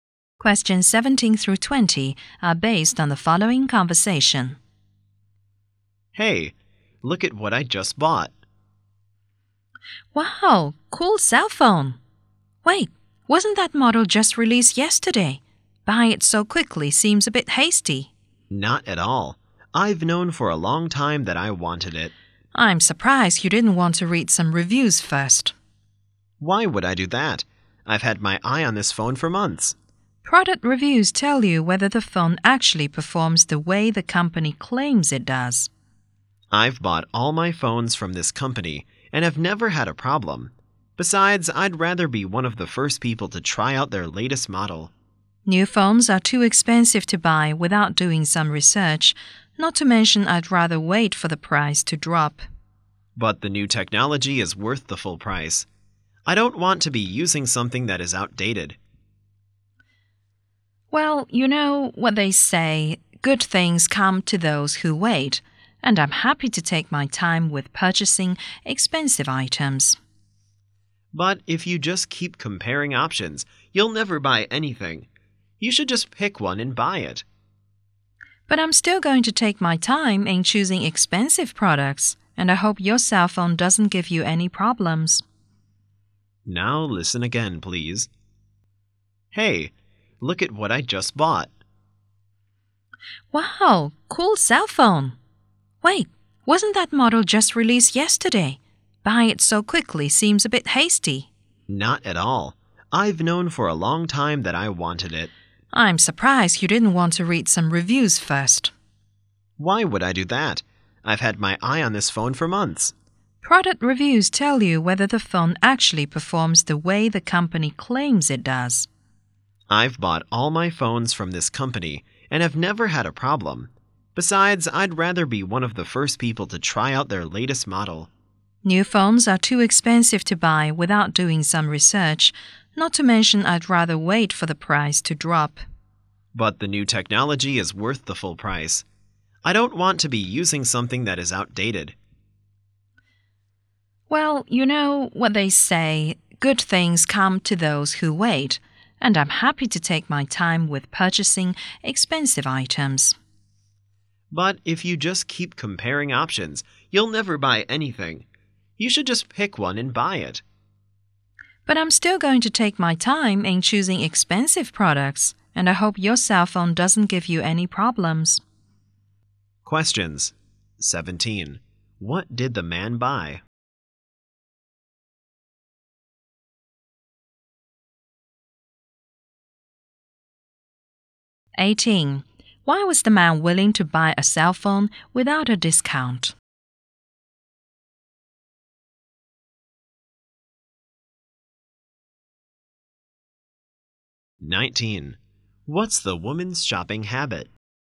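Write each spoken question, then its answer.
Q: What did the man buy?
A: A new cell phone.

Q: Why was the man willing to buy a cell phone without a discount?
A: He thinks the new technology is worth the full price.

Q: What's the woman's shopping habit?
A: She takes her time, reads reviews and waits for prices to drop before buying expensive items.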